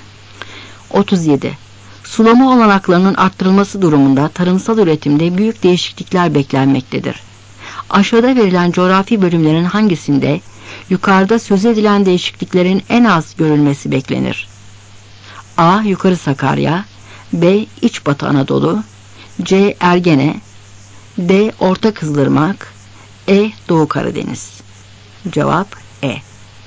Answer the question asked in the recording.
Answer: Cevap E.